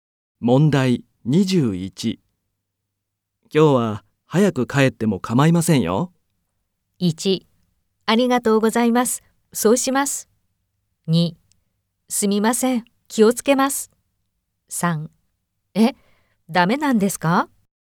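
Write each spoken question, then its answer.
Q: 今日は早く帰っても構いませんよ。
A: 3: ありがとうございます。そうします。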